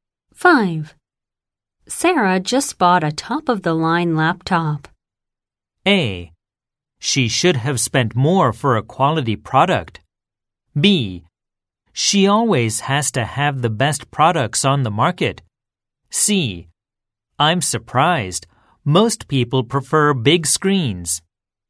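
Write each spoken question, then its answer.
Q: Sarah just bought a top-of-the-line laptop.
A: B: She always has to have the best products on the market.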